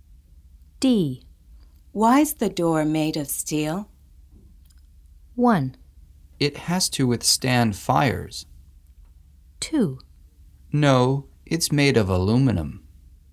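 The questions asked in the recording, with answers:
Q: Why's the door made of steel?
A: 1: It has to withstand fires.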